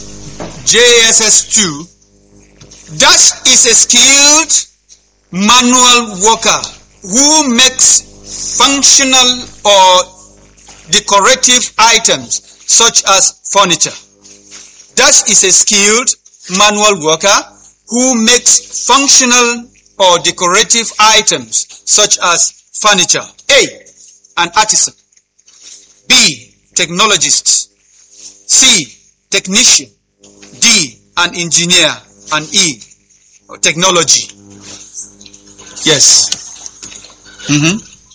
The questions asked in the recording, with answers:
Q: Dash is a skilled manual worker who makes functional or decorative items such as furniture.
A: Artisan, which is letter